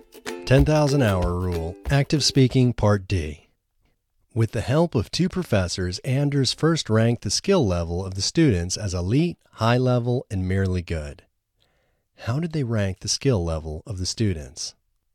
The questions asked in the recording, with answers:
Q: How did they rank the skill level of the students?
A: They ranked the skill level of the students as elite, high level, and merely good.